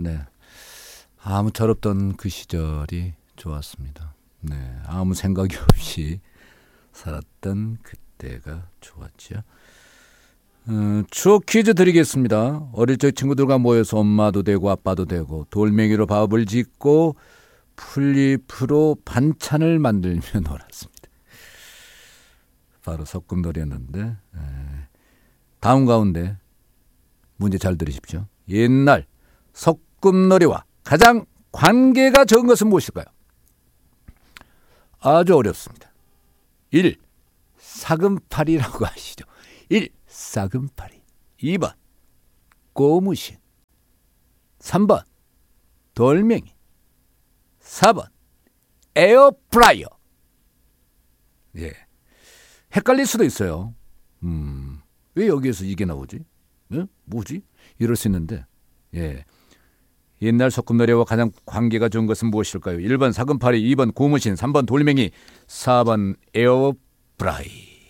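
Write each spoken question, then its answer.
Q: 옛날 소꿉놀이와 가장 관계가 적은 것은 무엇일까요?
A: 4번: 에어프라이어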